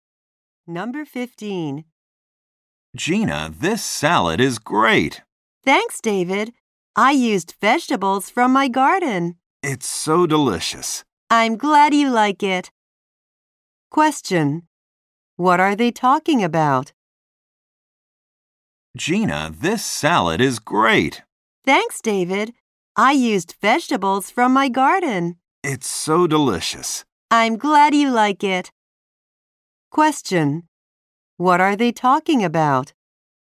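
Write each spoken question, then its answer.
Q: What are they talking about?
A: Gina's salad.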